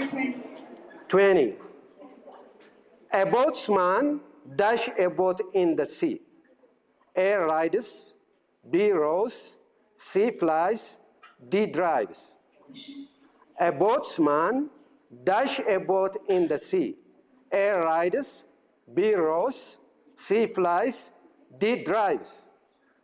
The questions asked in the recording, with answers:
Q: A boatsman dash a boat in the sea.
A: Rows. A boatsman rows.